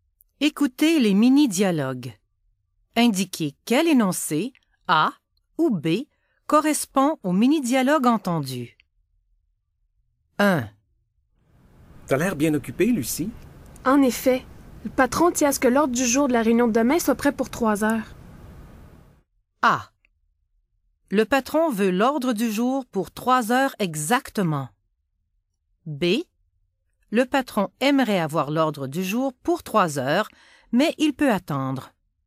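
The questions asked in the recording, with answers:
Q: Indiquez quel énoncé, A ou B, correspond au mini-dialogue entendu.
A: A: Le patron veut l'ordre du jour pour 3 heures exactement.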